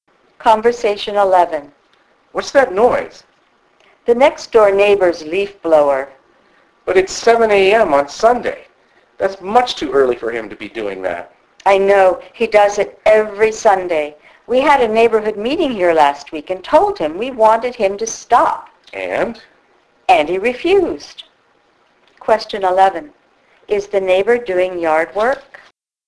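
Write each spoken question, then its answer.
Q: Is the neighbor doing yard work?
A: Yes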